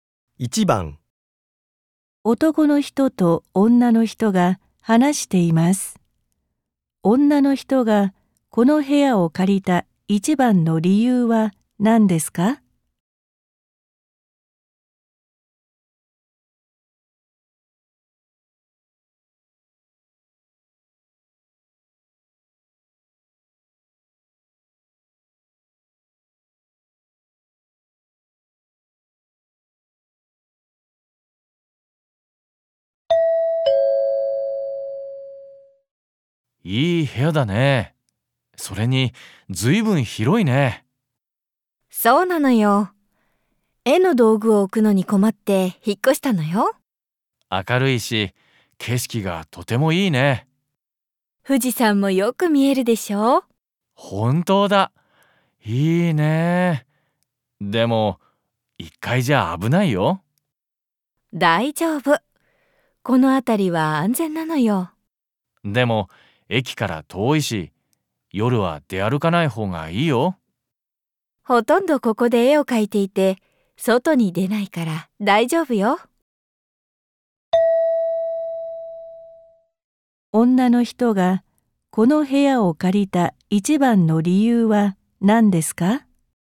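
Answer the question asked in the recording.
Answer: 部屋が広いから(絵の道具を置く場所が必要だったから)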